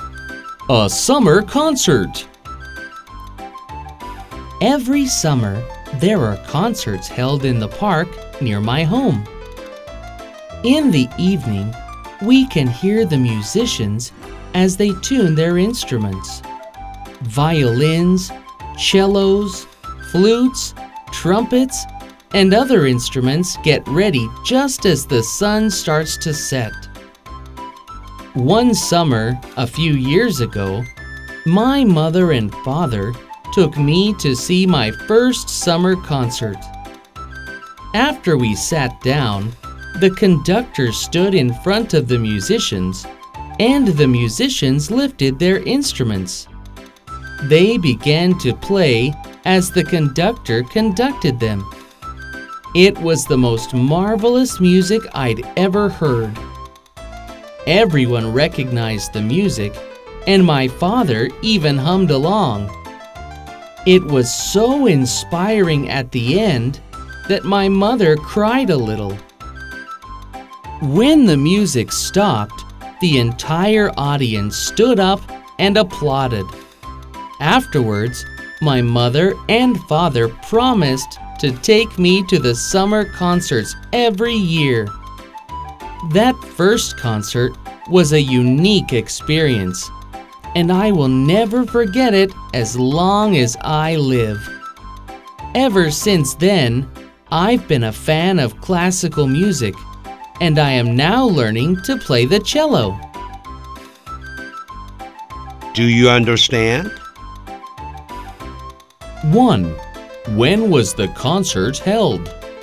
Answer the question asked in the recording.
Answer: It was held in the summer.